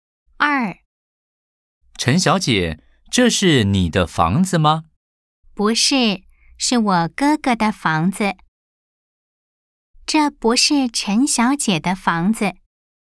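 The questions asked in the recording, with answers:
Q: 这不是陈小姐的房子。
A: 对 (O)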